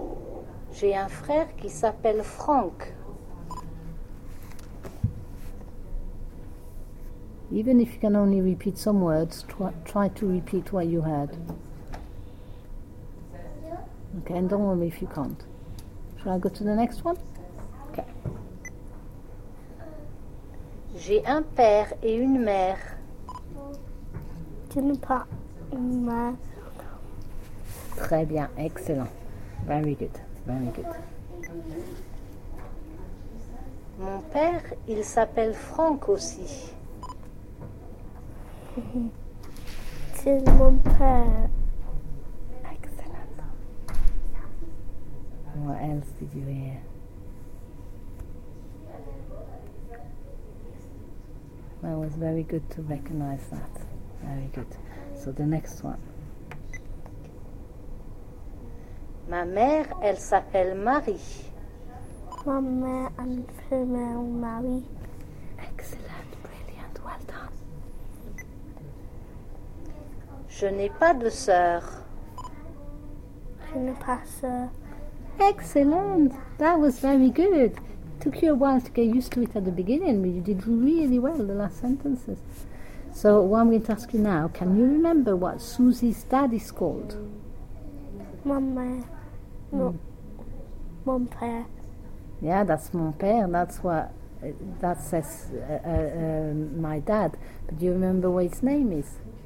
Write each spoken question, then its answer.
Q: can you remember what Susie's dad is called?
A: He's called Franck.